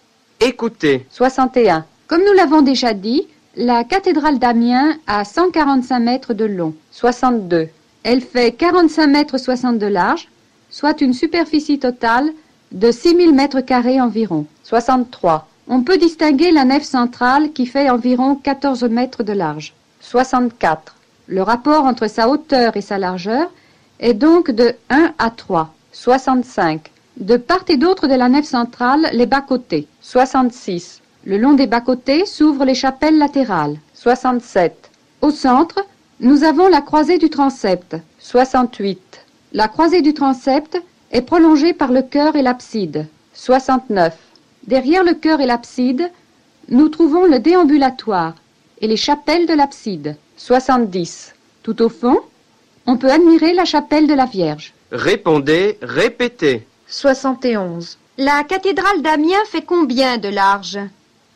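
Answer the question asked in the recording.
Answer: 45 mètres 60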